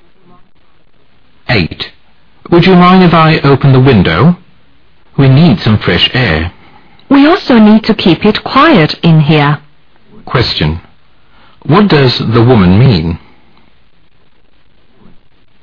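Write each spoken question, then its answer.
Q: What does the woman mean?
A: She would rather keep the window closed because of the noise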